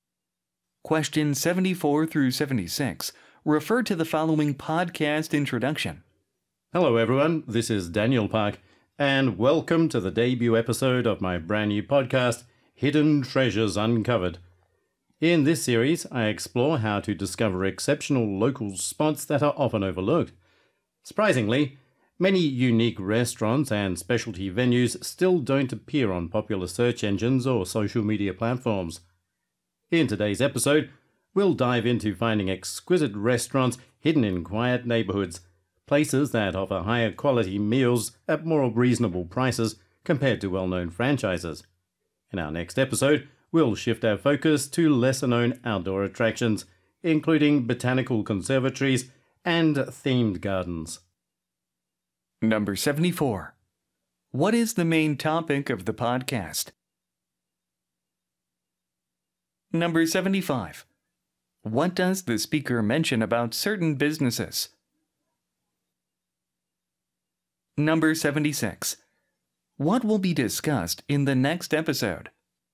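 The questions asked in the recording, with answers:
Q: What is the main topic of the podcast?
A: Discovering overlooked local spots

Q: What does the speaker mention about certain businesses?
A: They don't appear on popular search engines or social media

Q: What will be discussed in the next episode?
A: Lesser-known outdoor attractions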